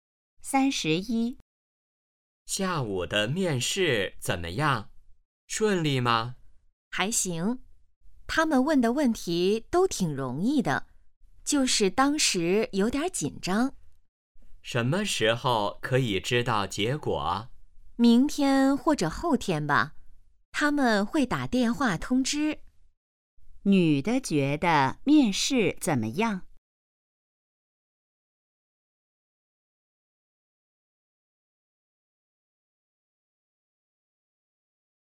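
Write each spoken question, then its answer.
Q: 女的觉得面试怎么样?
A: 问题挺容易,但有点紧张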